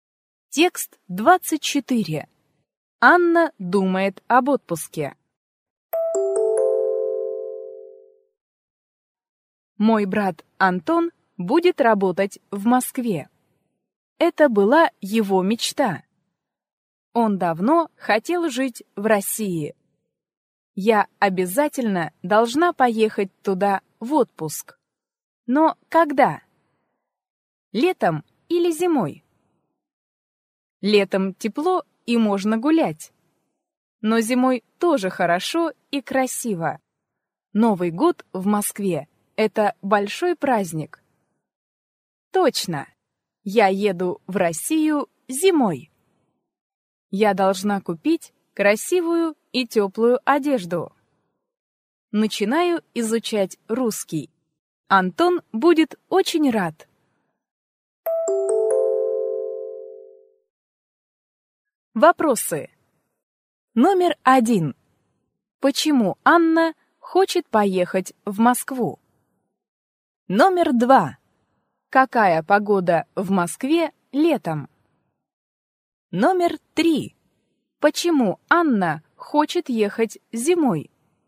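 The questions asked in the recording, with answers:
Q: Почему Анна хочет поехать в Москву?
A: Там будет работать её брат Антон

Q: Какая погода в Москве летом?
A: Тепло

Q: Почему Анна хочет ехать зимой?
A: Новый год в Москве — большой праздник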